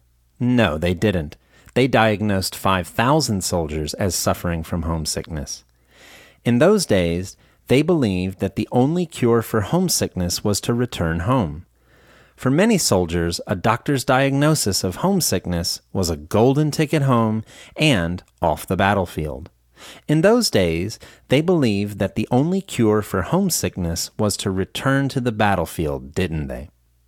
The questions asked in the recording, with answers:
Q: In those days, they believed that the only cure for homesickness was to return to the battlefield, didn't they?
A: No, that's not correct. They believed that the only cure for homesickness was to return home.